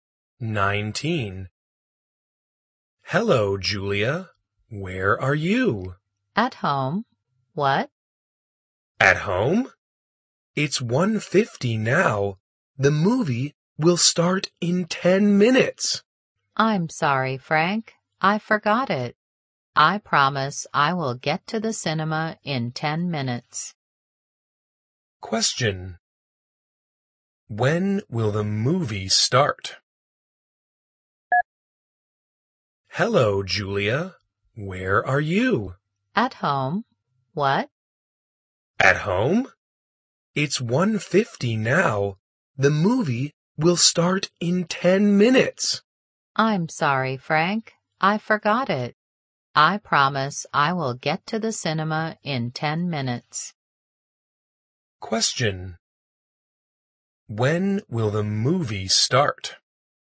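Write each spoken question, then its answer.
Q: When will the movie start?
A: At 2:00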